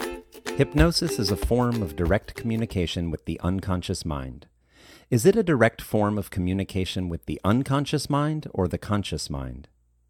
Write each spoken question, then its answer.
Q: Is it a direct form of communication with the unconscious mind or the conscious mind?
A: It is a direct form of communication with the unconscious mind.